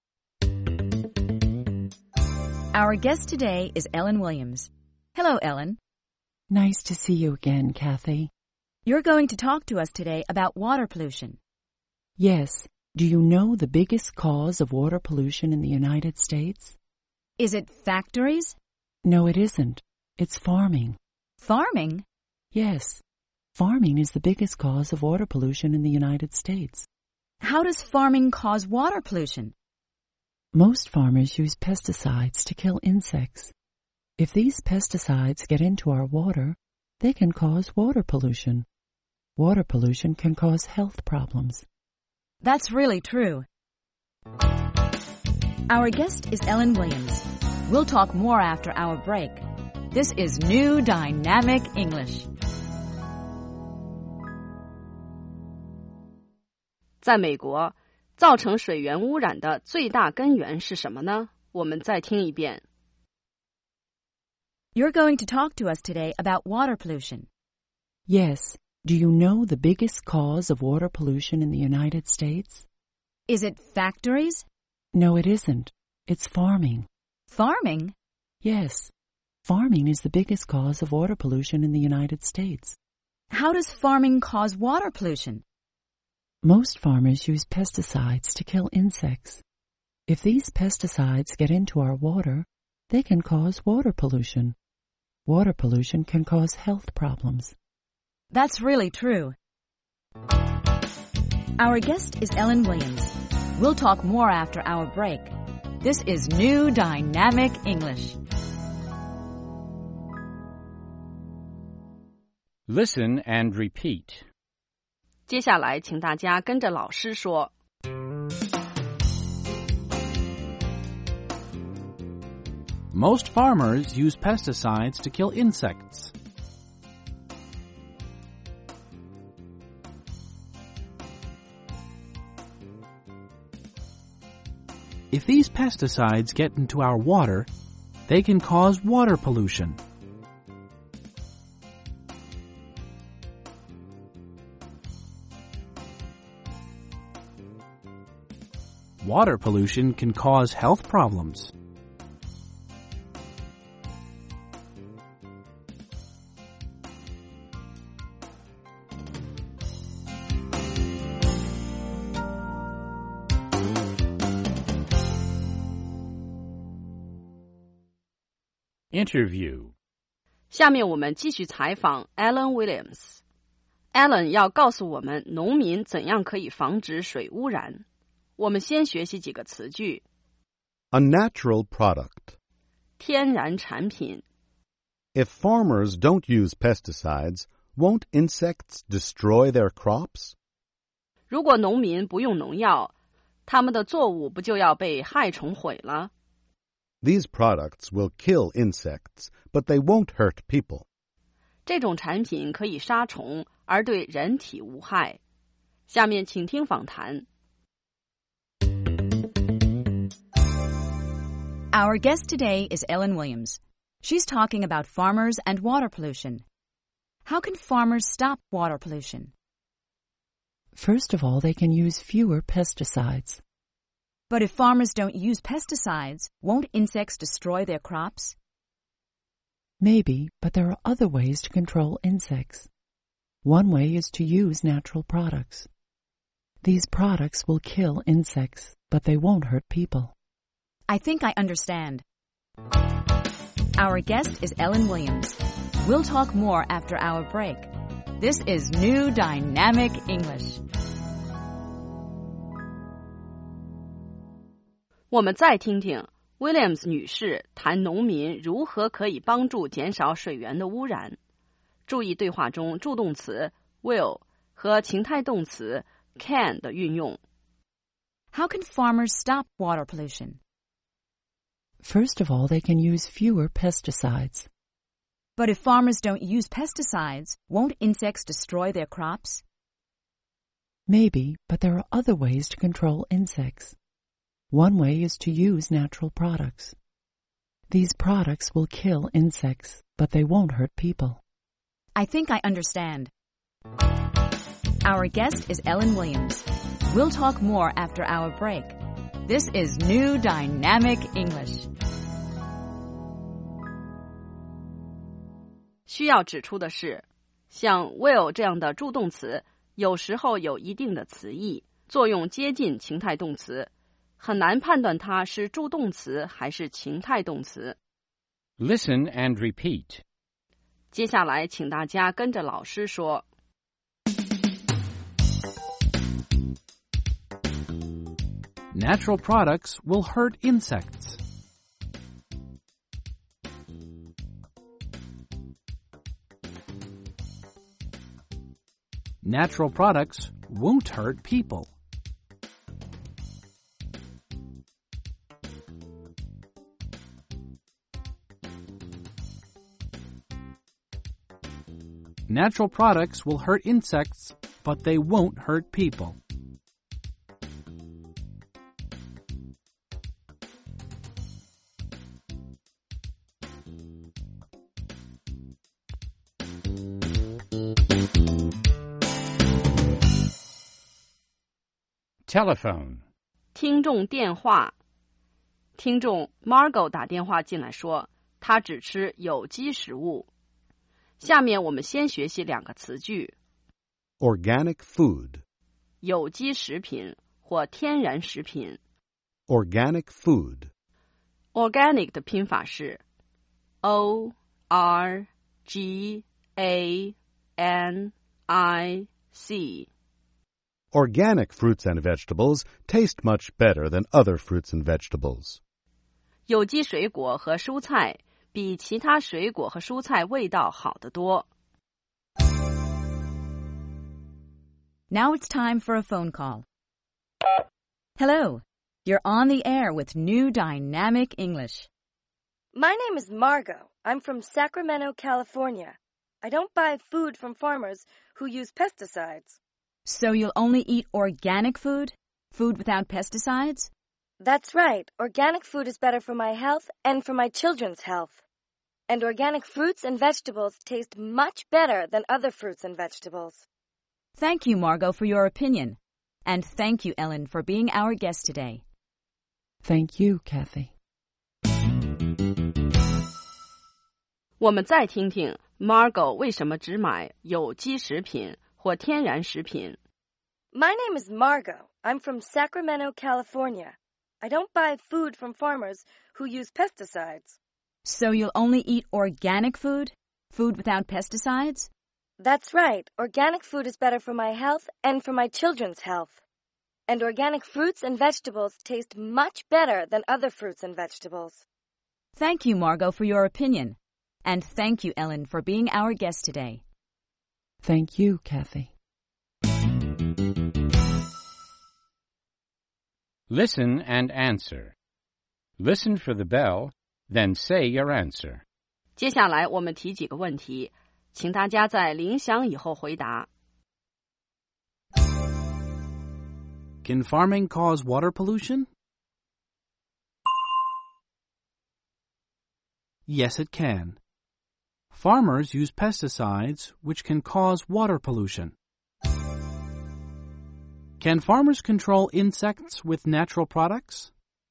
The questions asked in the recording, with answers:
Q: Can farming cause water pollution?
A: Yes, it can. Farmers use pesticides, which can cause water pollution.

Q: Can farmers control insects with natural products?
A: Yes, they can. These products will kill insects, but they won't hurt people.